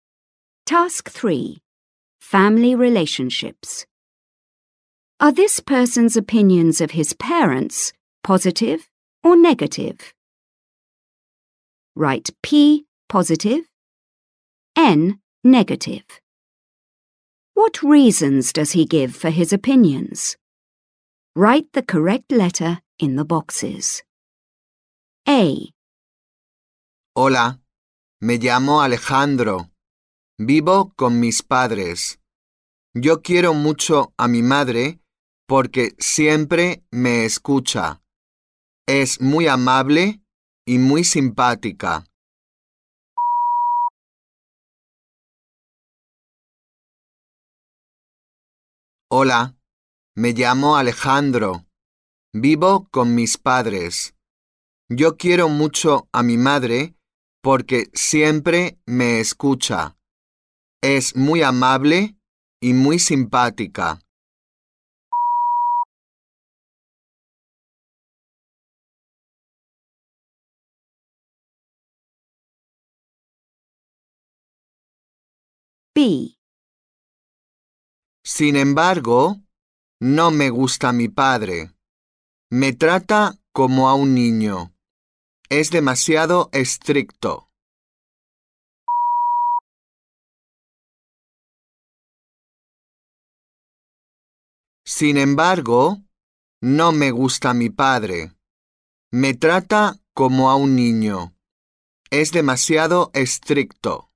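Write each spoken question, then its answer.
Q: Are this person's opinions of his parents positive or negative?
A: Mother: positive (P); father: negative (N)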